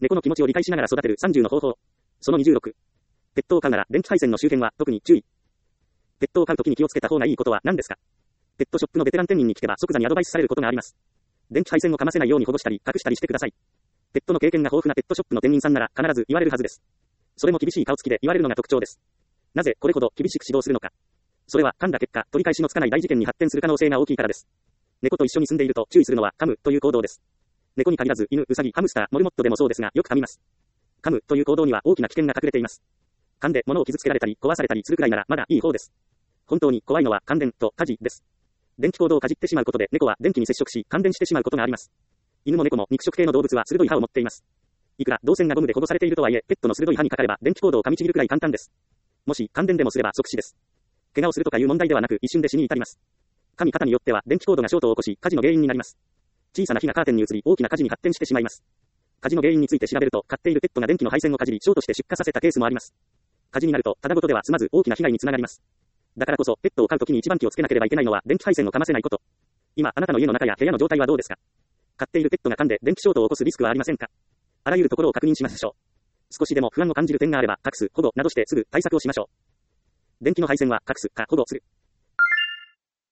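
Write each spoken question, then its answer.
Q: ペットを飼うときに気をつけた方がいいことは何ですか?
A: 電気配線をかませないこと(隠すか保護する)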